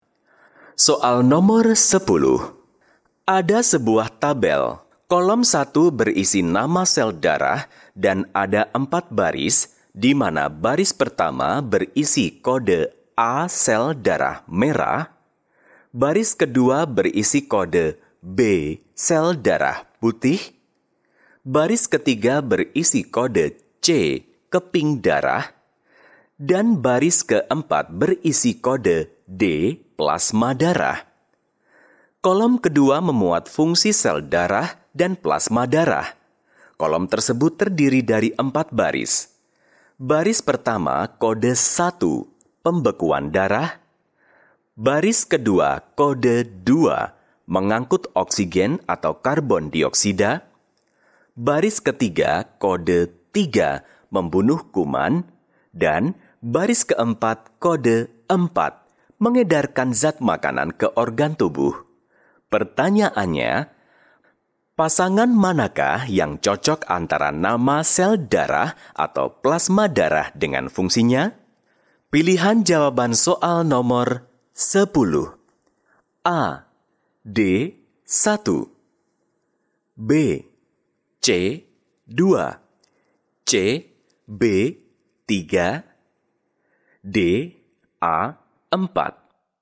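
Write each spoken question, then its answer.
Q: Pertanyaannya, pasangan manakah yang cocok antara nama sel darah atau plasma darah dengan fungsinya?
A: C: B. 3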